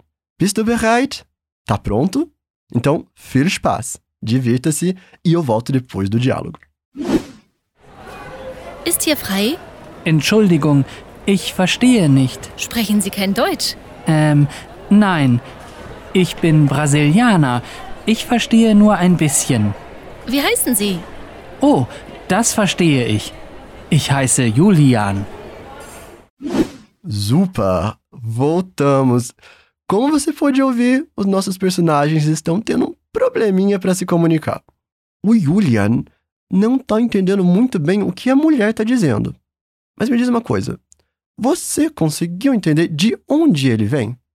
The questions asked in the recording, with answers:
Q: Mas me diz uma coisa: você conseguiu entender de onde ele vem?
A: Percebe que ele fala Ich bin Brasilianer, que significa eu sou brasileiro.